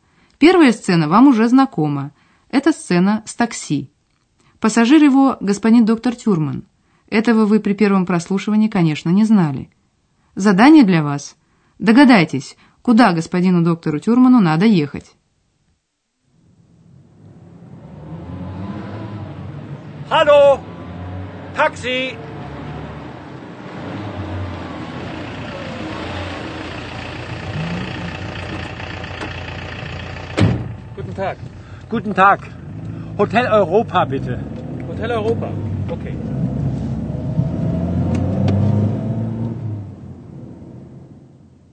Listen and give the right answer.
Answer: Итак, доктору Тюрману нужно, чтобы такси отвезло его в отель Европа.